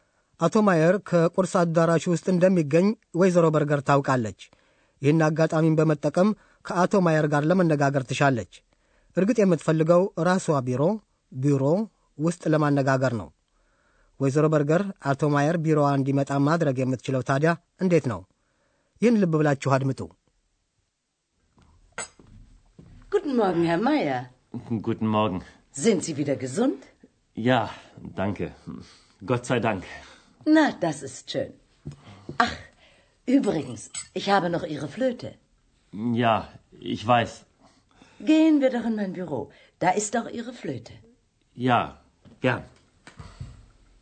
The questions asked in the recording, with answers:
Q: ወይዘሮ በርገር አቶ ማየር ቢሮዋ እንዲመጣ ማድረግ የምትችለው ታዲያ እንዴት ነው?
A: የአቶ ማየር ዋሽንት ወይዘሮ በርገር ዘንድ እንደምትገኝና ቢሮዋ ውስጥ እንደተቀመጠች